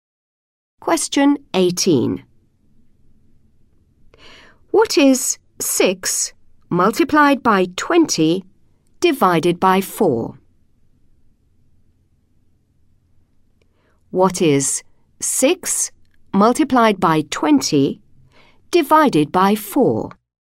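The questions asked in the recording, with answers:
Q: What is 6 multiplied by 20 divided by 4?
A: 30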